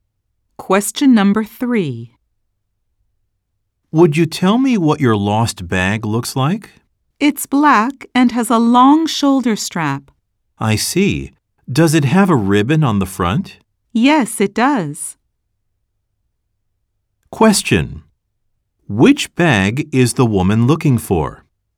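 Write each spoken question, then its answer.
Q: Which bag is the woman looking for?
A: A black bag with a long shoulder strap and a ribbon on the front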